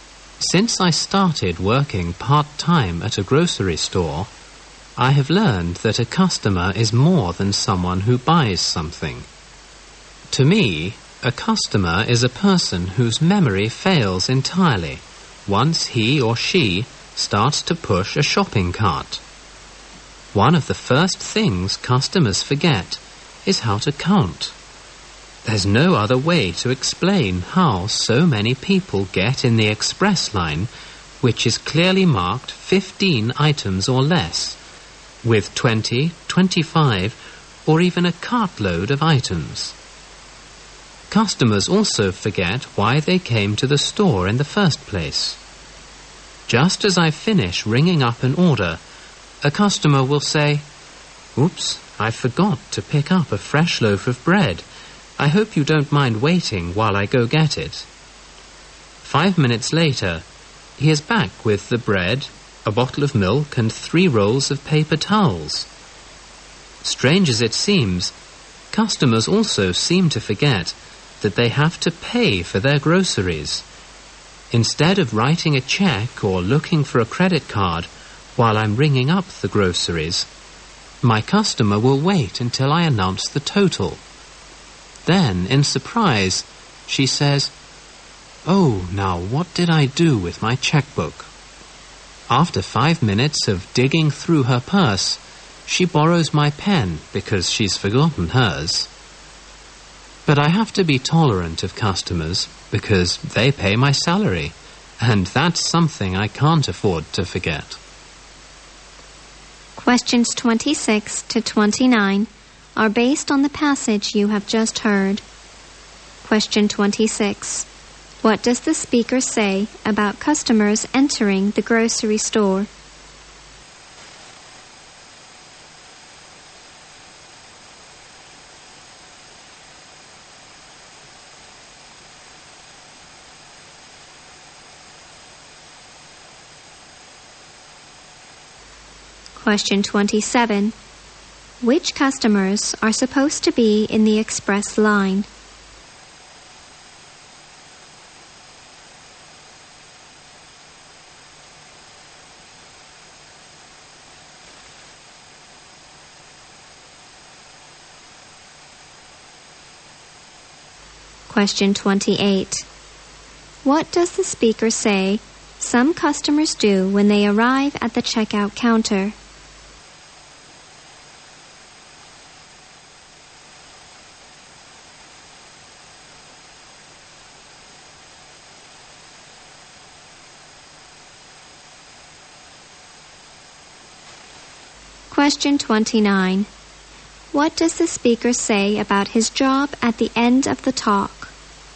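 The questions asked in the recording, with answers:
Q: What does the speaker say about customers entering the grocery store?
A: Their memory fails once they start pushing a shopping cart

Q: Which customers are supposed to be in the express line?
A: Those with 15 items or less

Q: What does the speaker say about his job at the end of the talk?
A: He must be tolerant of customers because they pay his salary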